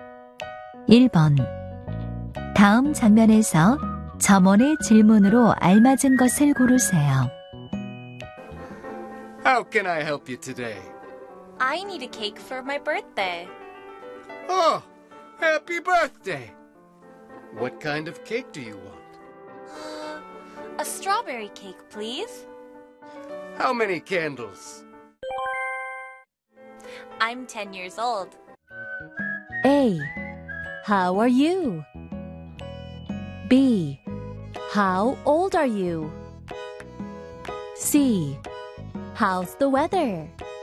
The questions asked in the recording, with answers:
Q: 다음 장면에서 점원의 질문으로 알맞은 것을 고르세요.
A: How old are you?